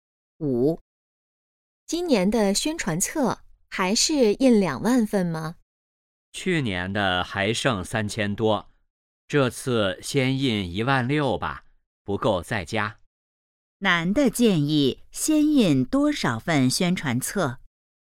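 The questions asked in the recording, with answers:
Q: 男的建议先印多少份宣传册?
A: 16000份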